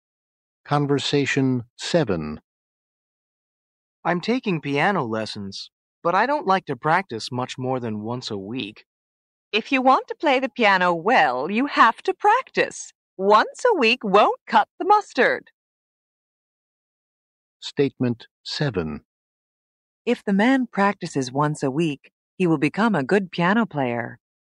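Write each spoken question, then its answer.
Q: If the man practices once a week, he will become a good piano player.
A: False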